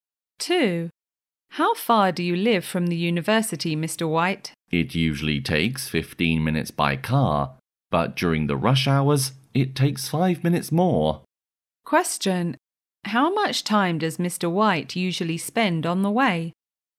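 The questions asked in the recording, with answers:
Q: How much time does Mr. White usually spend on the way?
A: 15 minutes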